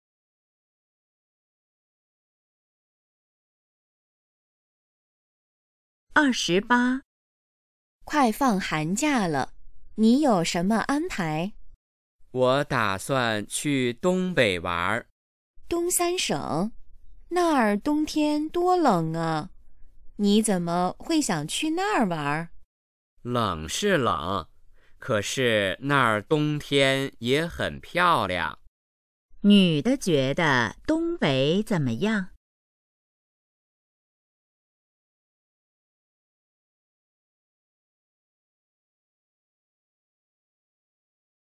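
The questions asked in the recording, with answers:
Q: 女的觉得东北怎么样?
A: 冬天虽冷但很漂亮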